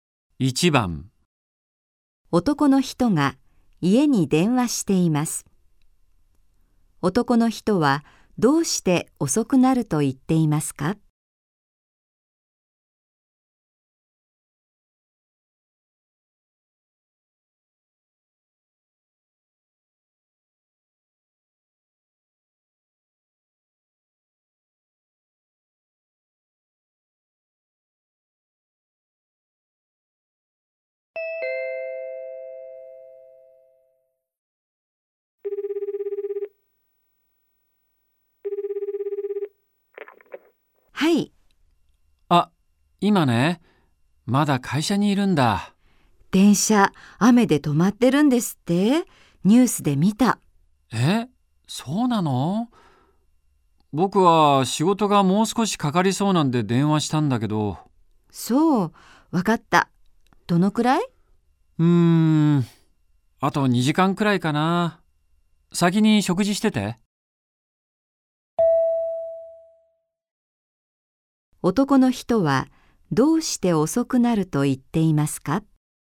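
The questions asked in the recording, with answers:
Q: 男の人はどうして遅くなると言っていますか?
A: 仕事がもう少しかかりそうだから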